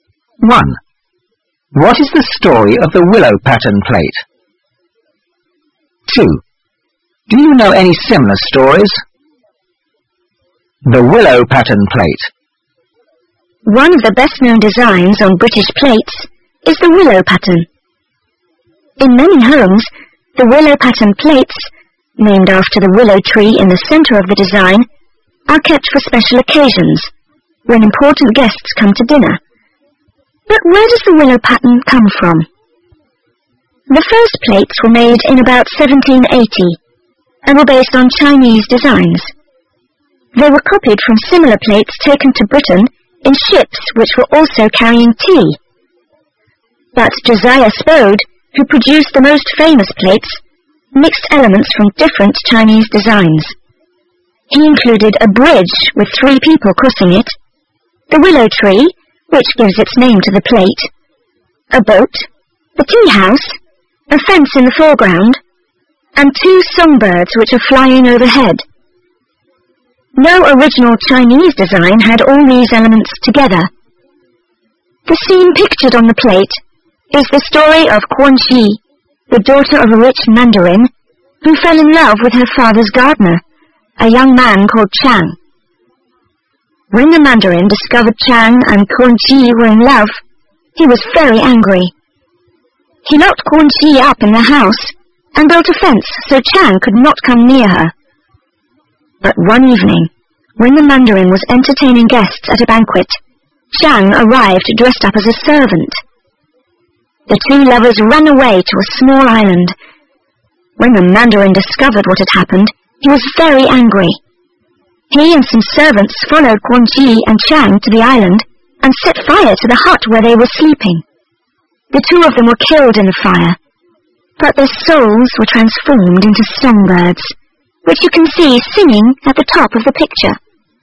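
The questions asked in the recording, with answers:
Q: What is the story of the willow pattern plate?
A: Quan Chi, a rich mandarin's daughter, fell in love with the gardener Chang. They ran away to an island, the angry mandarin burned their hut and they died, and their souls became songbirds.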